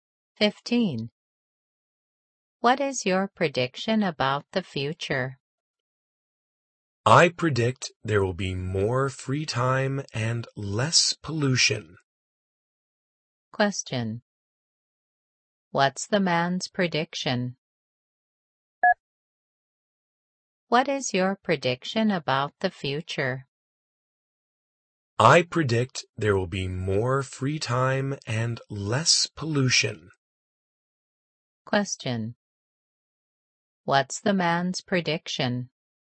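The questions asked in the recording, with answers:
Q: What's the man's prediction?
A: More free time and less pollution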